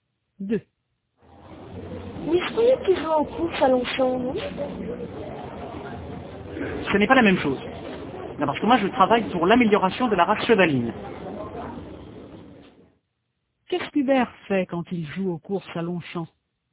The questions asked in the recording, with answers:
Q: Qu'est-ce qu'Hubert fait quand il joue aux courses à Longchamp ?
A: Il travaille pour l'amélioration de la race chevaline.